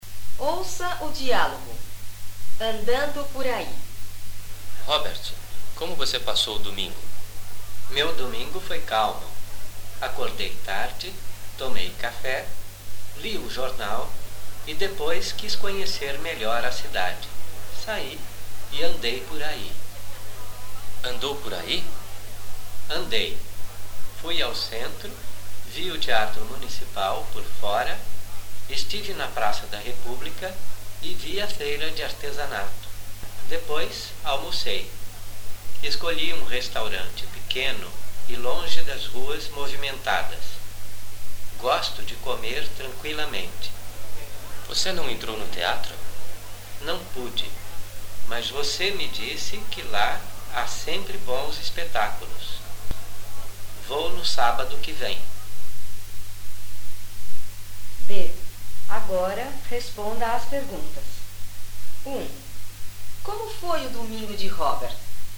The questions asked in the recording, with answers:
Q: Como foi o domingo de Robert?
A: Seu domingo foi calmo. O domingo dele foi calmo.